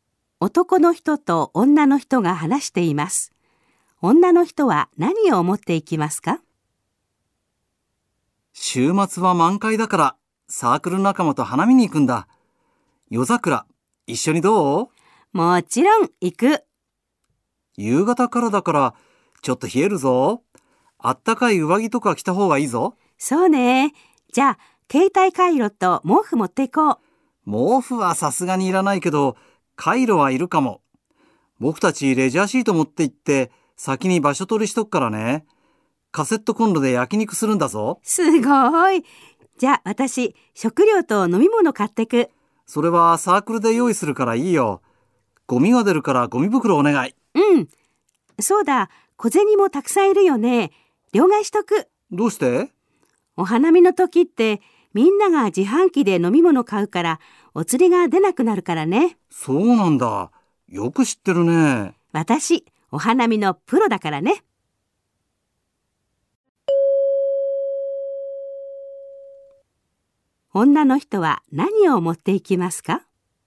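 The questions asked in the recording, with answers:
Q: 女の人は何を持っていきますか?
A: カイロとゴミ袋と小銭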